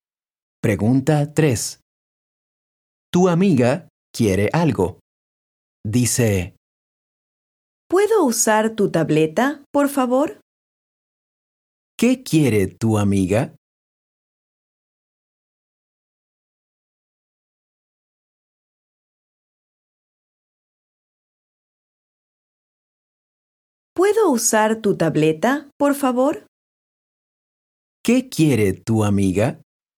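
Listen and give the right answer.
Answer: Usar tu tableta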